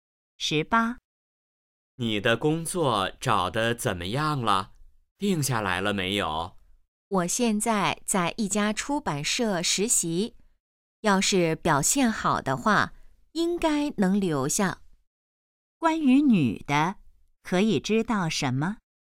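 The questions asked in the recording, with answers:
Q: 关于女的,可以知道什么?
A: 她在一家出版社实习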